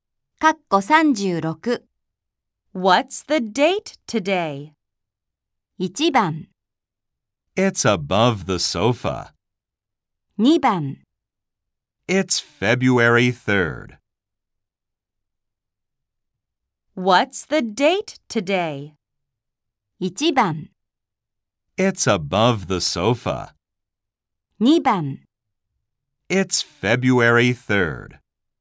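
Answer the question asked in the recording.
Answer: 2: It's February 3rd.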